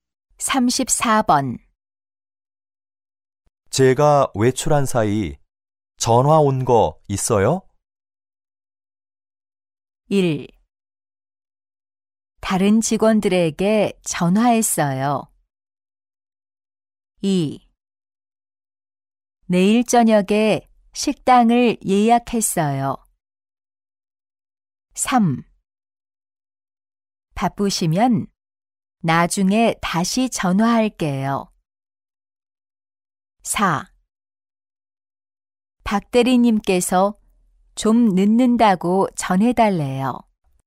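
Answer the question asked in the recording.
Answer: 4: 박 대리님께서 좀 늦는다고 전해달래요.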